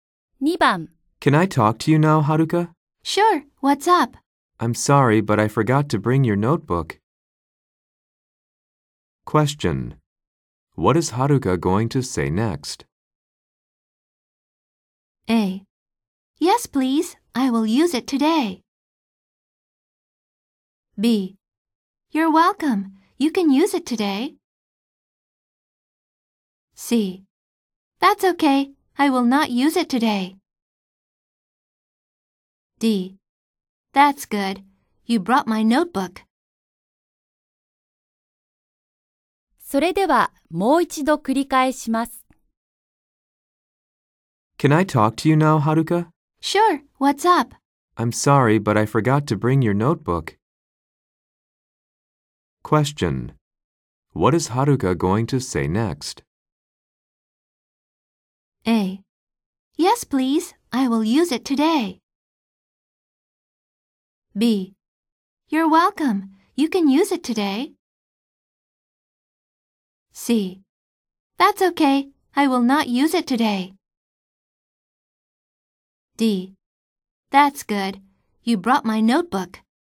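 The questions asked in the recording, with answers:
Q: What is Haruka going to say next?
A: C: That's okay. I will not use it today.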